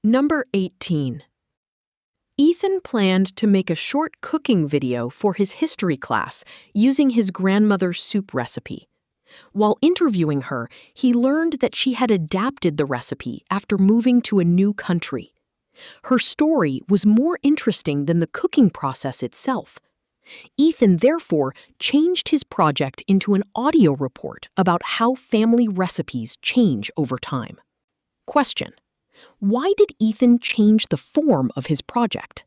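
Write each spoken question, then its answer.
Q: why did Ethan change the form of his project?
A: Because his grandmother's story about adapting the recipe was more interesting than the cooking process itself.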